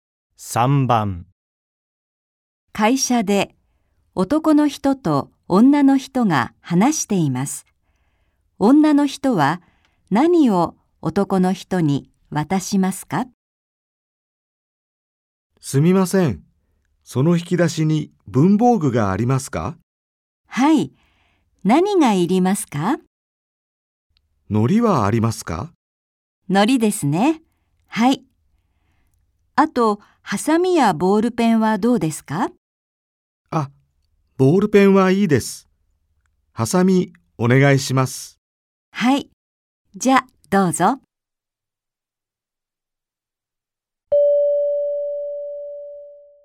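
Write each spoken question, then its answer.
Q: 女の人は何を男の人に渡しますか?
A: 糊とハサミ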